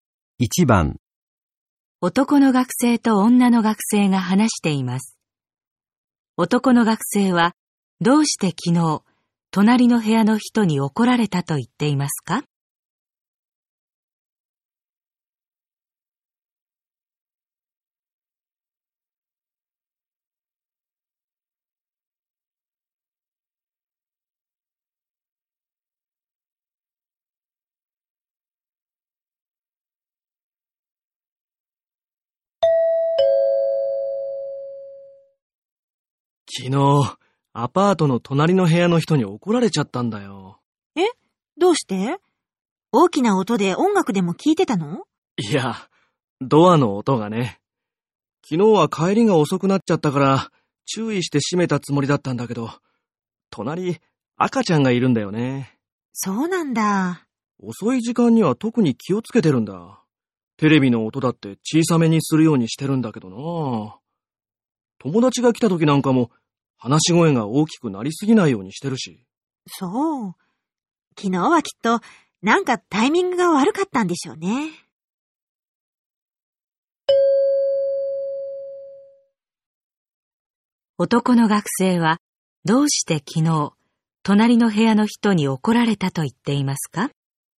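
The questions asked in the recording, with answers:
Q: 男の学生はどうして昨日隣の部屋の人に怒られたと言っていますか?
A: ドアを閉める音がうるさかったから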